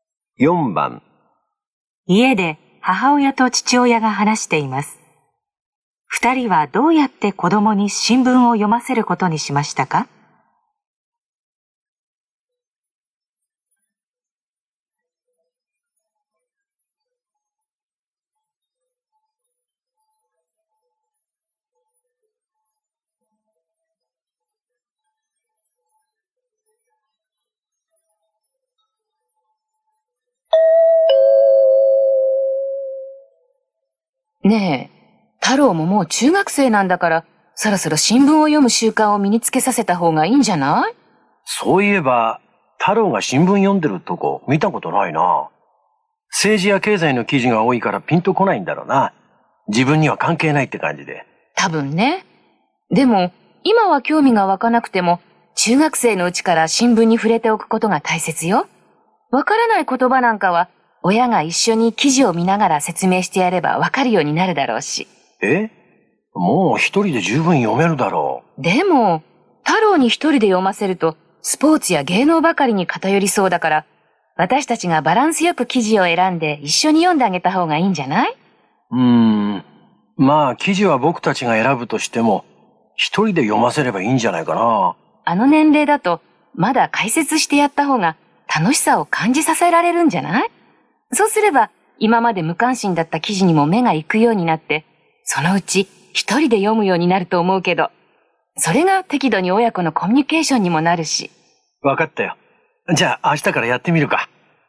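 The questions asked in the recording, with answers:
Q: 二人はどうやって子供に新聞を読ませることにしましたか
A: 親が記事を選び、一緒に読んで解説する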